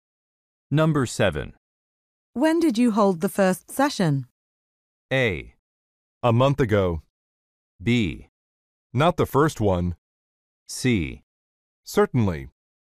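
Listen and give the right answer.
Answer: A: A month ago.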